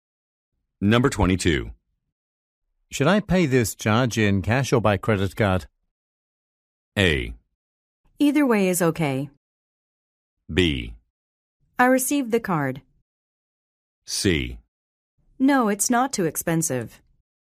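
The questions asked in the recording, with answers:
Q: Should I pay this charge in cash or by credit card?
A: A: Either way is okay.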